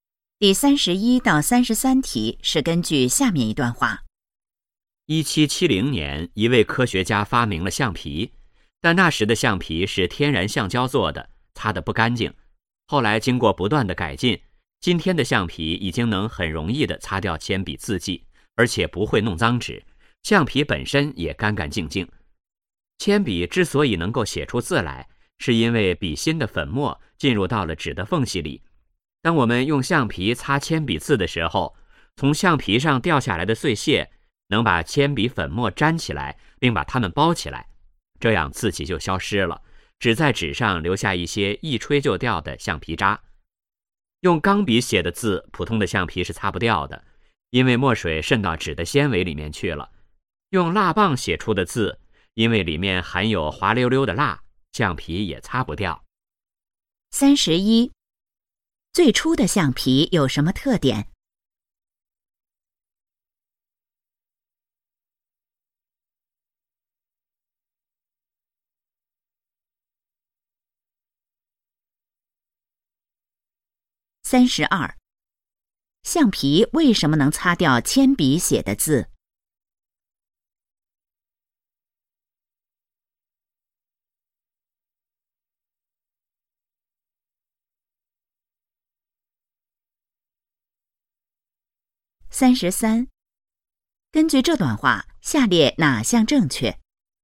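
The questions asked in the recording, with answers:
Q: 最初的橡皮有什么特点?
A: 用天然橡胶做的,擦不干净

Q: 橡皮为什么能擦掉铅笔写的字?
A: 橡皮碎屑能把铅笔粉末粘起来包住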